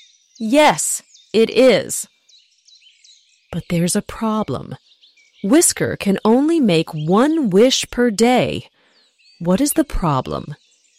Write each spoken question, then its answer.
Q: What is the problem?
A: He can only make one wish per day.